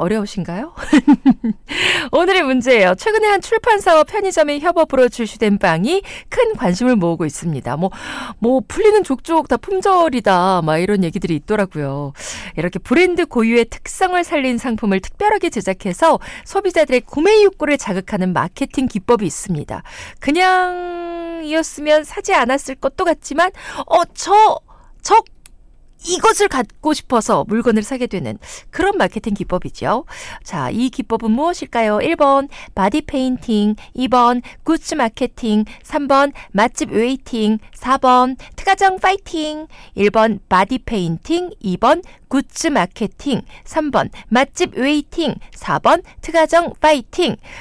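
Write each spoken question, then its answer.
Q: 자, 이 기법은 무엇일까요?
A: 2: 굿즈 마케팅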